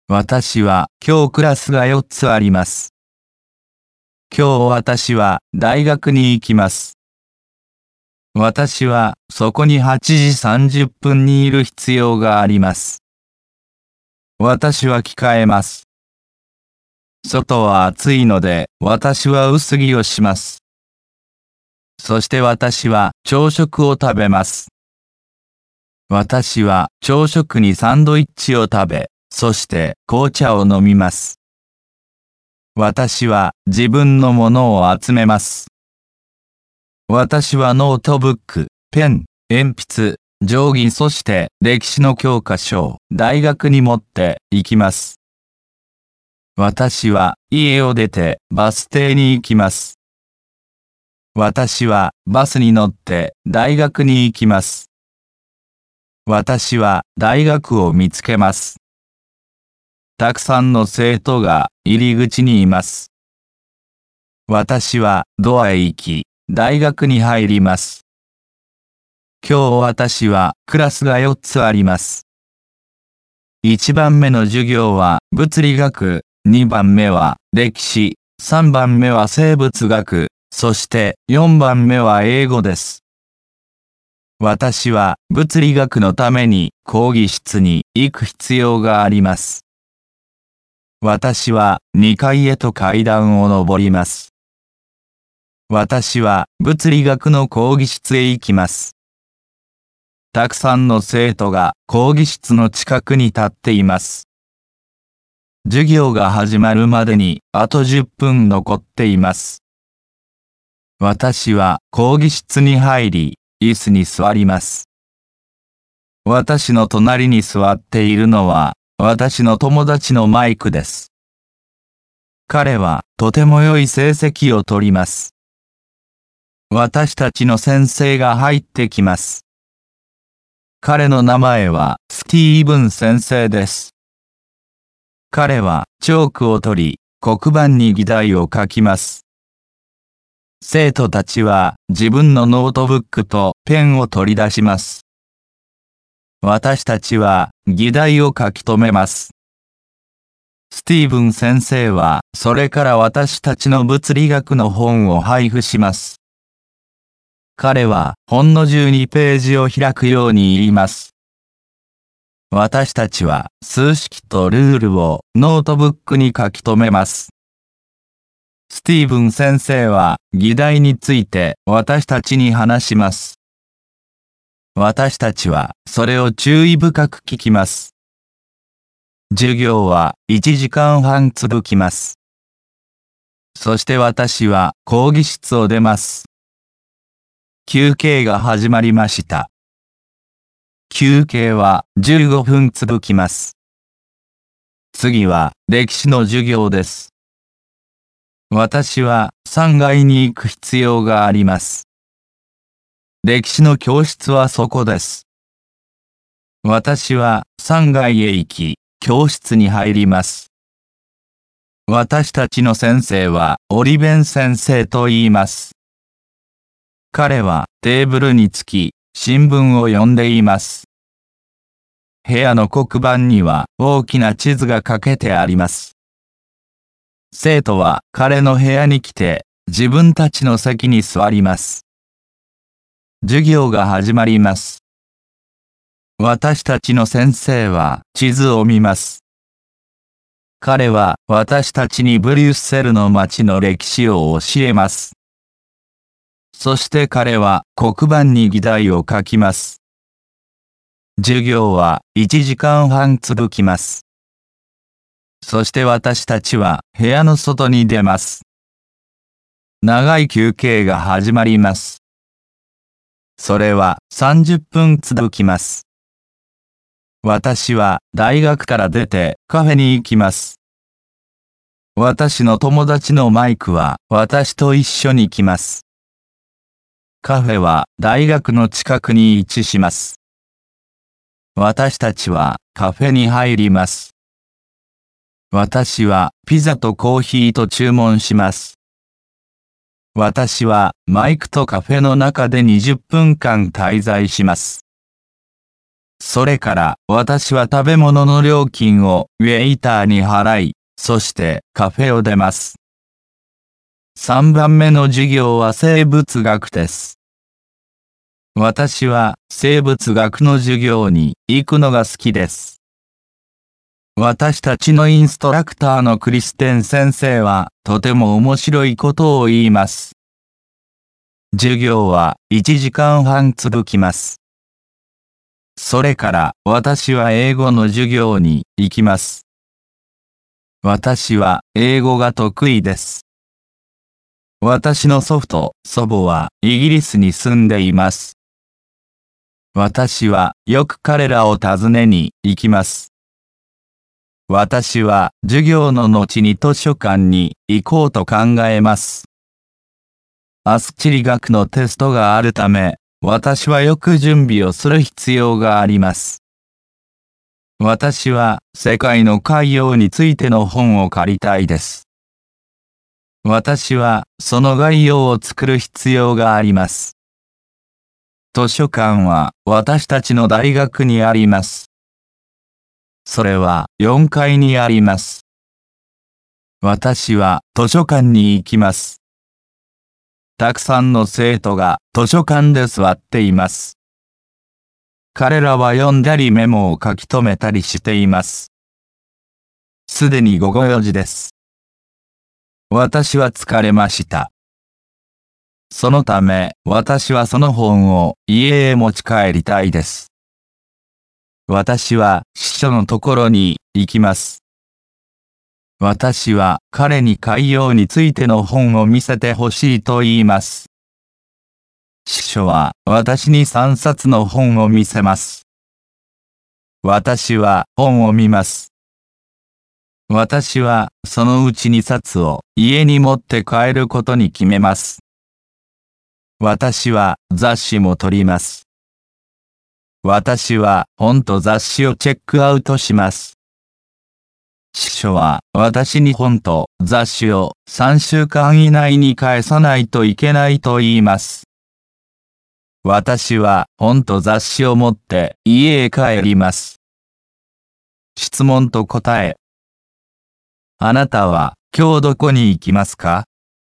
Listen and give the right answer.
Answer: 今日私は大学に行きます。